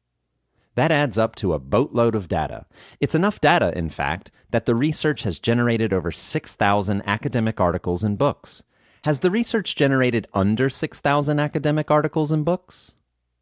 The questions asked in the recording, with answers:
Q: Has the research generated under 6,000 academic articles and books?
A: No, the research has not generated under 6,000 academic articles and books.